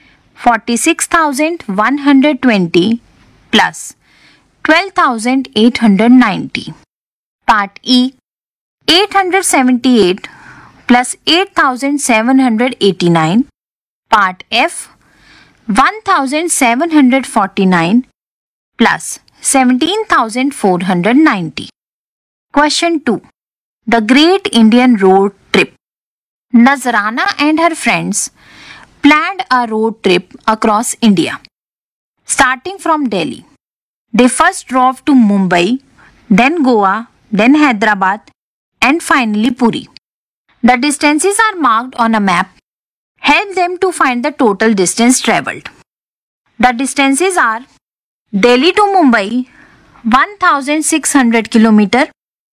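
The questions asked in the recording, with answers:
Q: Help them to find the total distance travelled.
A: 3915 km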